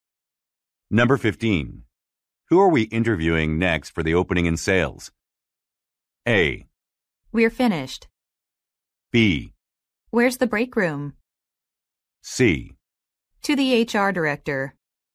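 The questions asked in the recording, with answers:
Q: Who are we interviewing next for the opening in sales?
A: A: We're finished.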